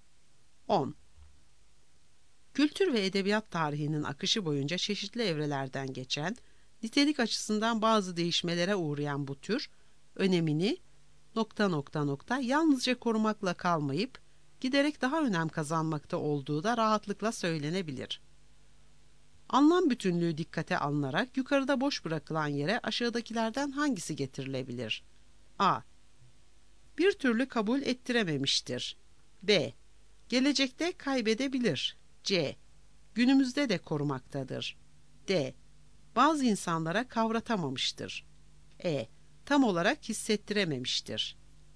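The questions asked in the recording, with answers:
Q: Anlam bütünlüğü dikkate alınarak yukarıda boş bırakılan yere aşağıdakilerden hangisi getirilebilir?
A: C: Günümüzde de korumaktadır.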